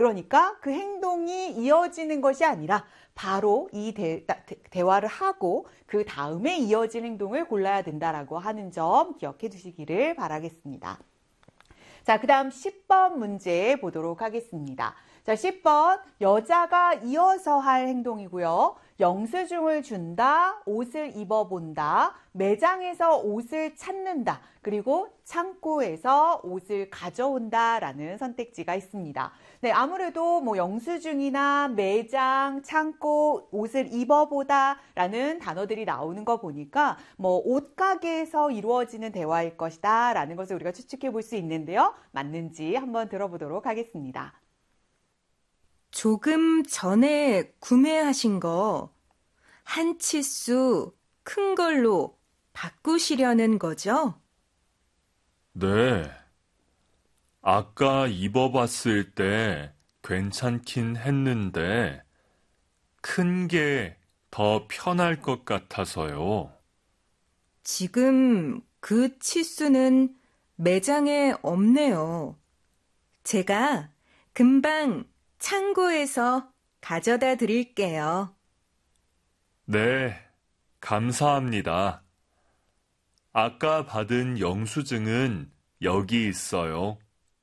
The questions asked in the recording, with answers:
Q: 여자가 이어서 할 행동이고요.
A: 자, 그래서 정답은 4번이 되겠습니다.